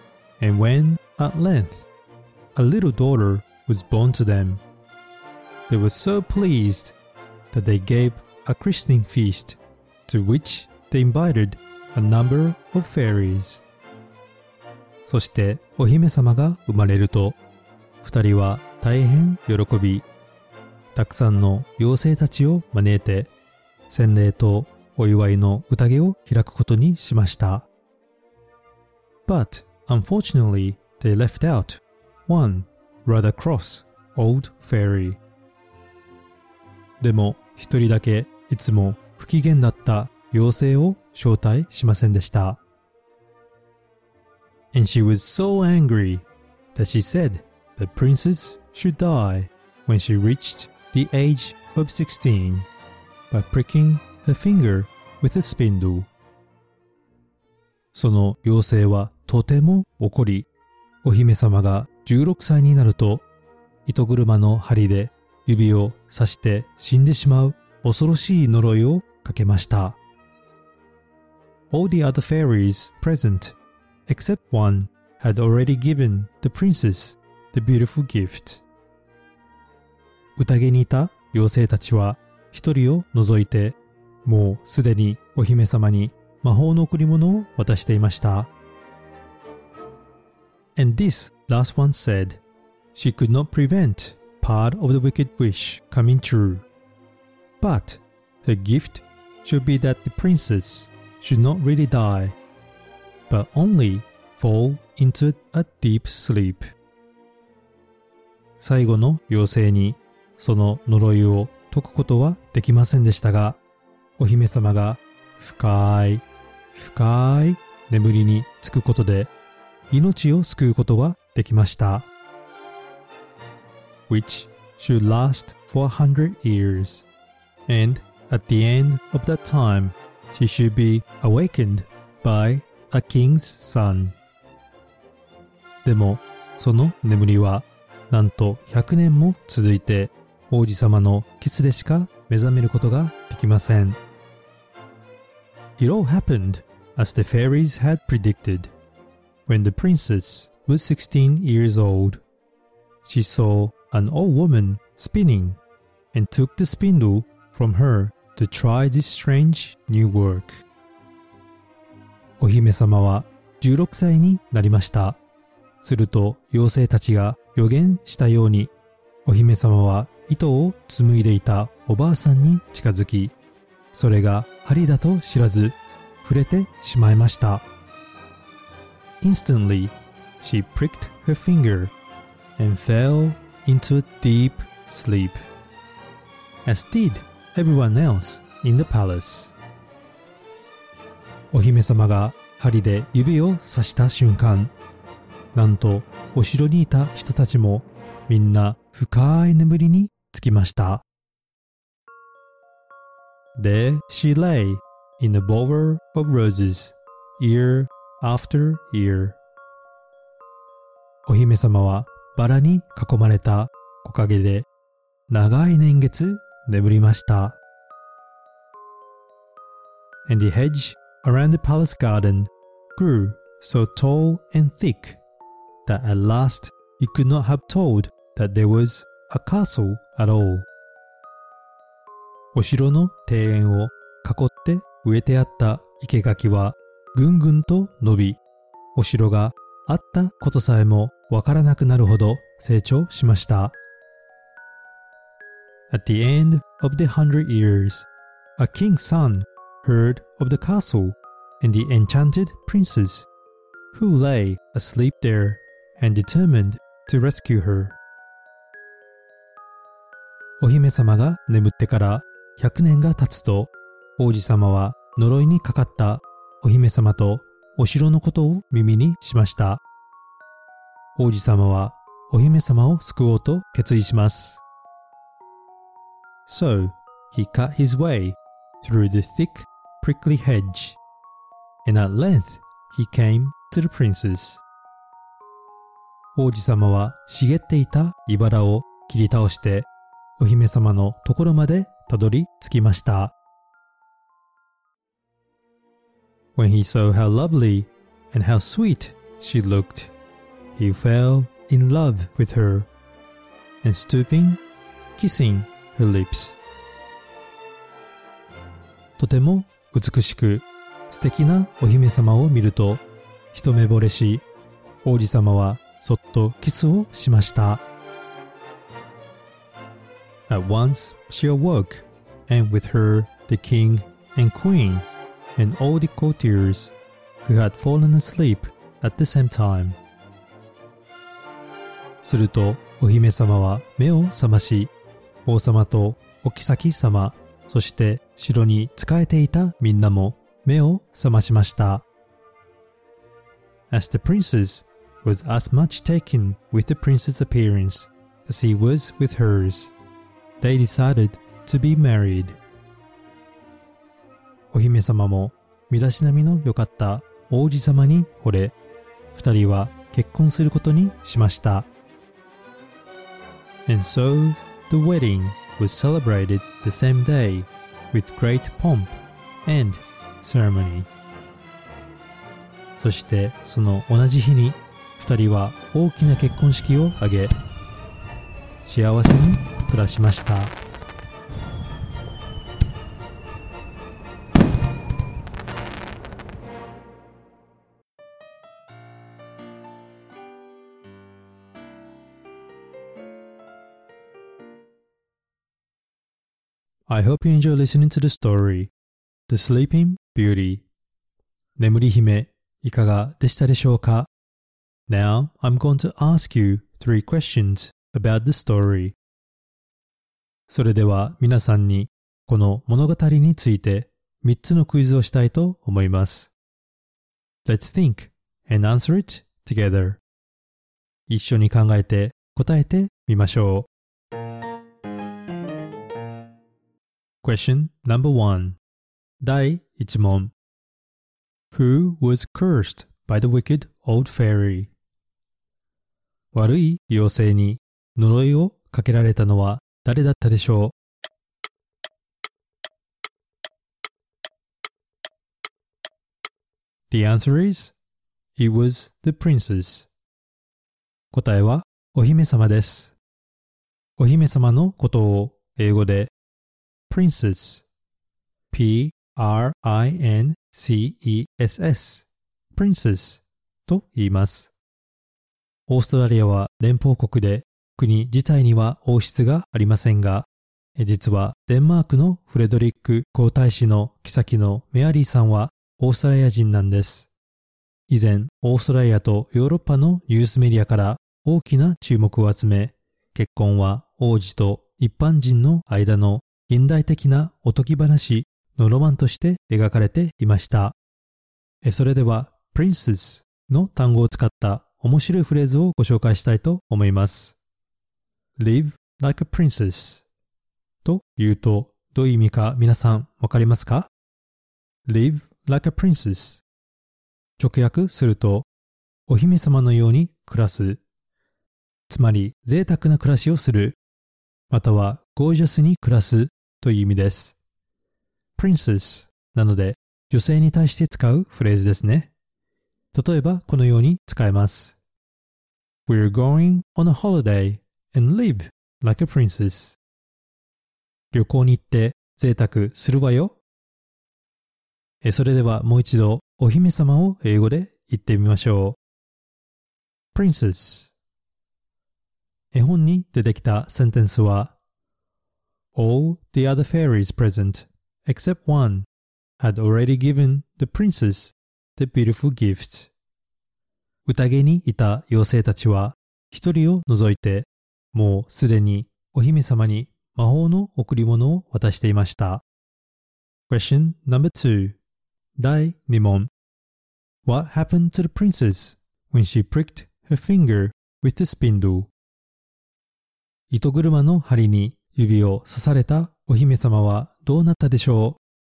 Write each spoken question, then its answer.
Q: What happened to the princess when she pricked her finger with the spindle?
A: The answer is she fell into a deep sleep.